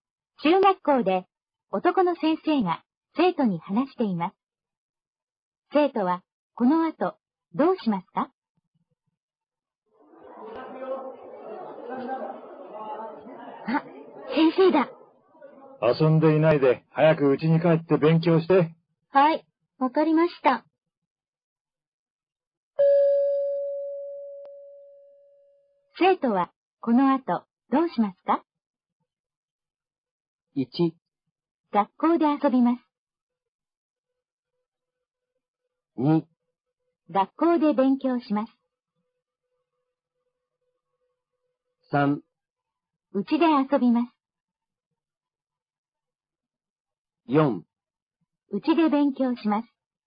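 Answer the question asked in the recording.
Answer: 4: うちで勉強します。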